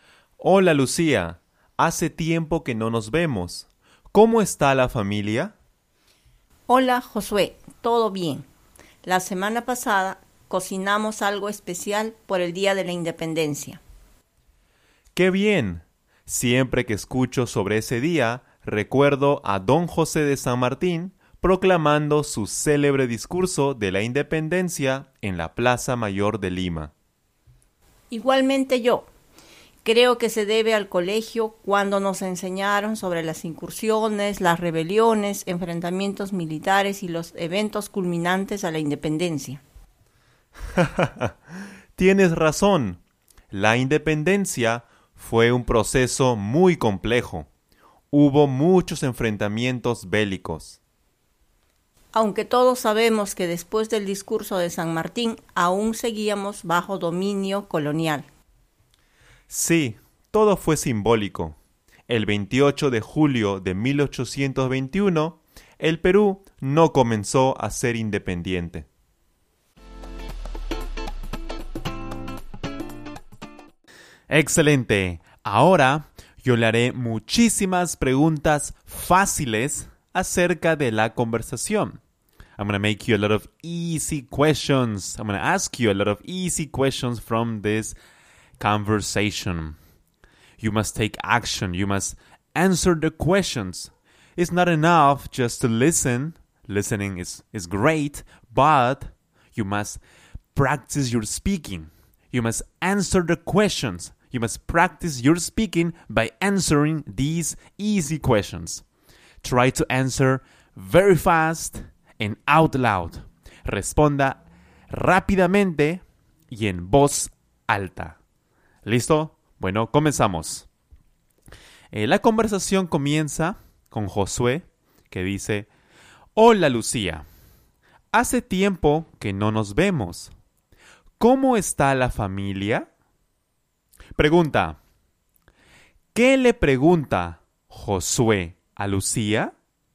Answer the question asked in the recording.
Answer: Josué le pregunta a Lucía ¿Cómo está la familia?